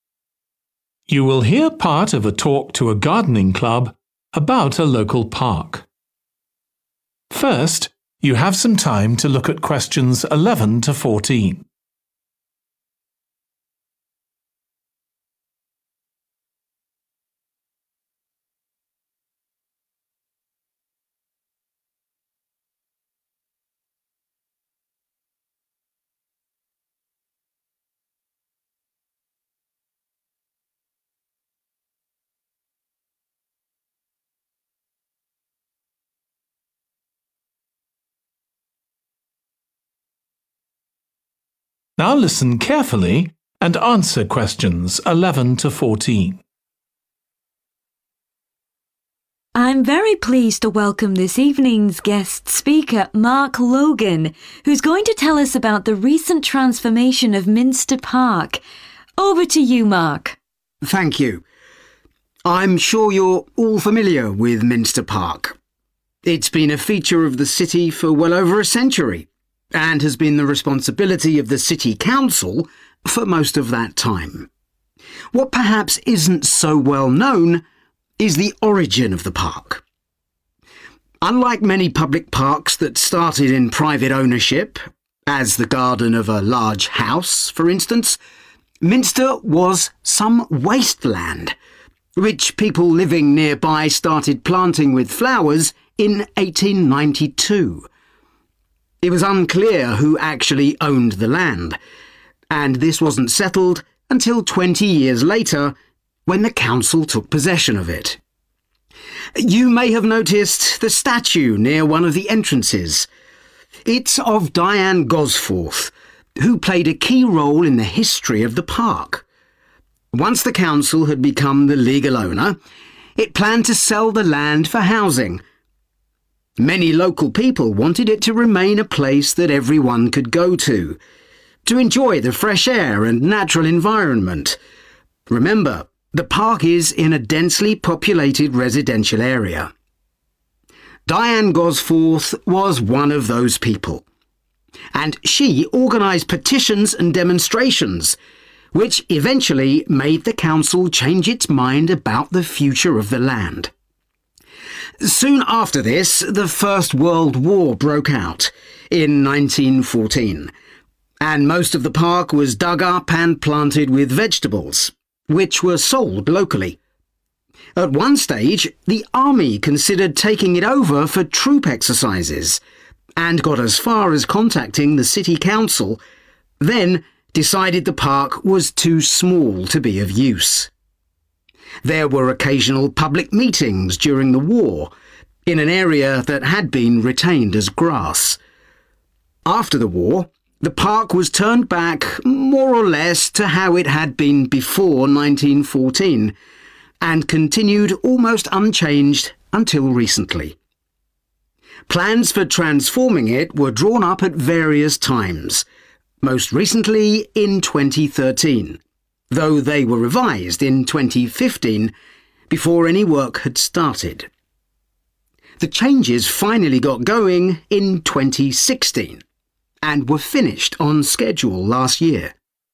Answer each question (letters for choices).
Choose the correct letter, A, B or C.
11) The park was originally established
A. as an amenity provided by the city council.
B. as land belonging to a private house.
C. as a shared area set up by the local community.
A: C

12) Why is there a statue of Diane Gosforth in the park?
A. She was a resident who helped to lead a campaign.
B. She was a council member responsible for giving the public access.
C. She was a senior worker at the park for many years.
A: A

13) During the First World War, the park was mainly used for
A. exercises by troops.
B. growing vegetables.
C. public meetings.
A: B

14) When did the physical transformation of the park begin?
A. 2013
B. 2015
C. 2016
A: C